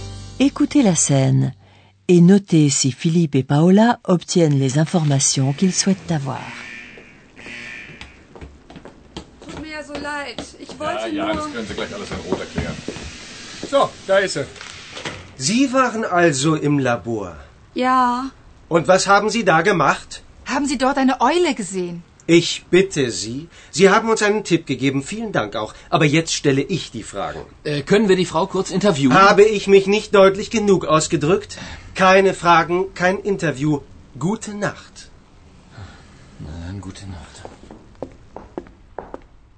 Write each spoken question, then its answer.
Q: Écoutez la scène. et notez si Philippe et Paola obtiennent les informations qu'ils souhaitent avoir.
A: Malheureusement, Philippe et Paola n'obtiennent aucune information.